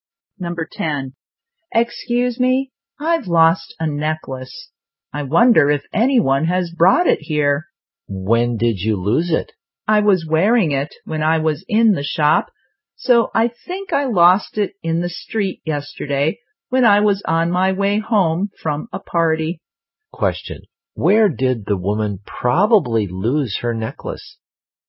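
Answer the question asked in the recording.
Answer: In the street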